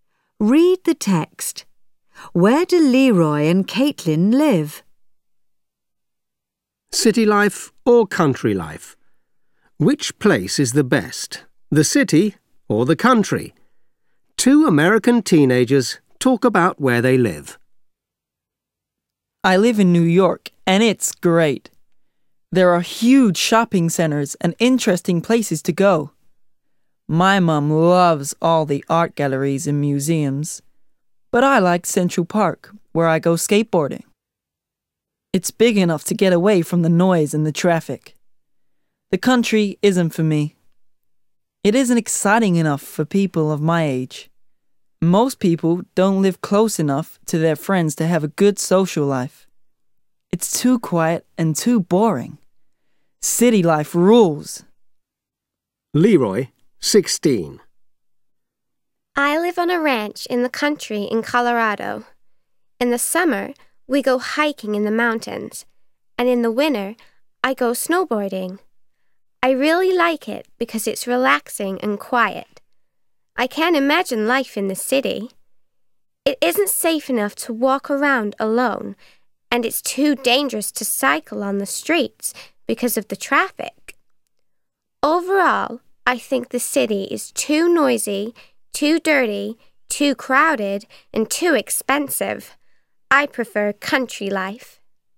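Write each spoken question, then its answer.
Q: Where do Leroy and Caitlin live?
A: Leroy lives in New York; Caitlin lives on a ranch in Colorado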